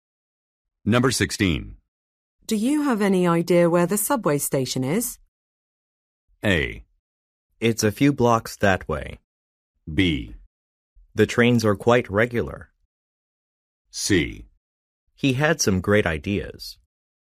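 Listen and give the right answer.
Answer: A: It's a few blocks that way.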